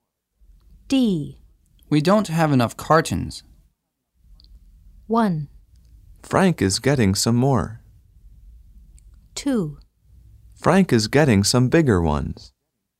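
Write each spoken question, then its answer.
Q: We don't have enough cartons.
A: 1: Frank is getting some more.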